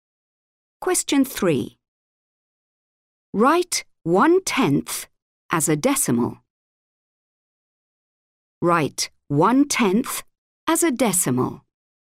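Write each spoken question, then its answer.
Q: Write 1/10 as a decimal.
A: 0.1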